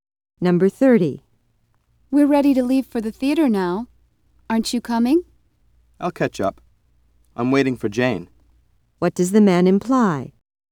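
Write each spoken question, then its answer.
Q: What does the man imply?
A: He will go to the theater later, after Jane arrives.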